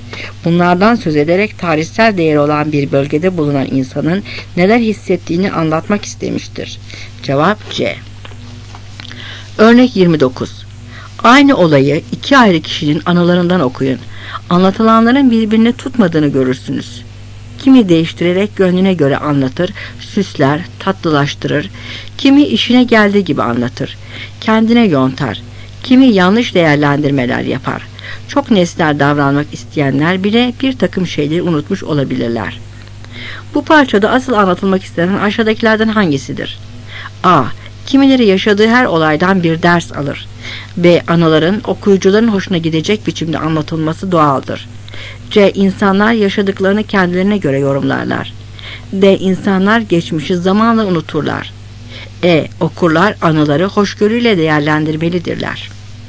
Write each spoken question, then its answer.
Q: Bu parçada asıl anlatılmak istenen aşağıdakilerden hangisidir?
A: Cevap C.